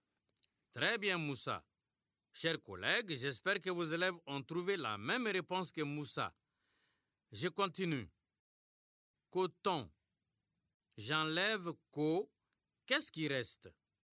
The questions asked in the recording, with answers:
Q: Coton. J'enlève co. Qu'est-ce qui reste?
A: Monsieur, il reste temps.